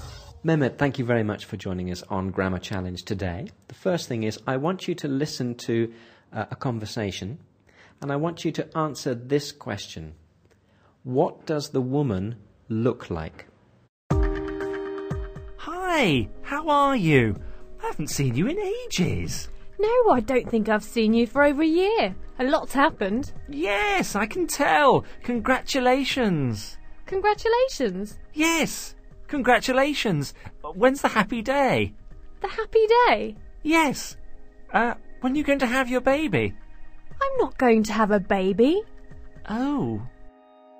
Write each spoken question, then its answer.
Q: What does the woman look like?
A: The woman looks like she's going to have a baby.